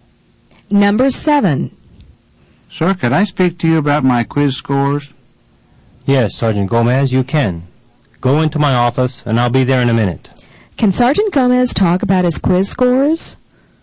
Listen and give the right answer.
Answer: The answer is yes. He can talk about his quiz scores.